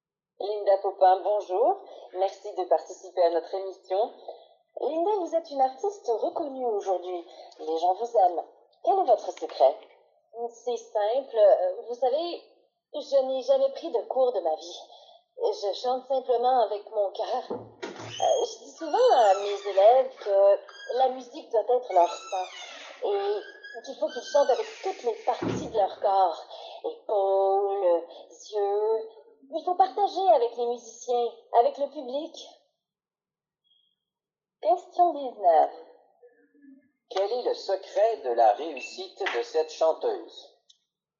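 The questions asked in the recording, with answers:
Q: Quel est le secret de la réussite de cette chanteuse?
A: Elle chante avec son cœur.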